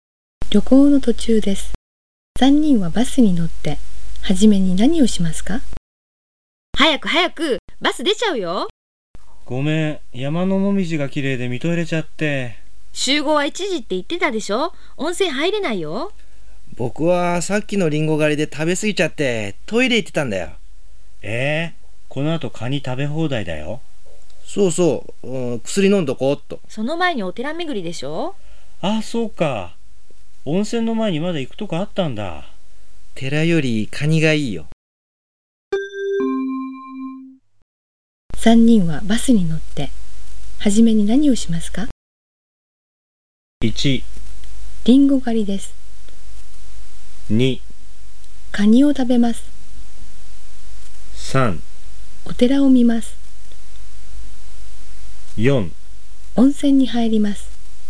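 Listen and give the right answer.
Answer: 3: お寺を見ます。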